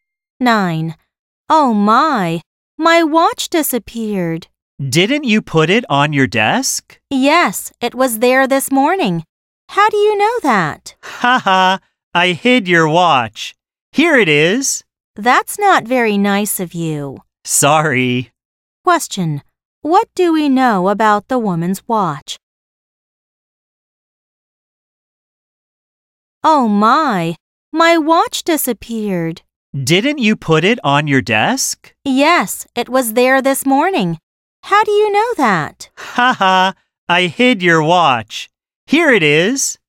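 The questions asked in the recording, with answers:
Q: Question: what do we know about the woman's watch?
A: The other speaker hid it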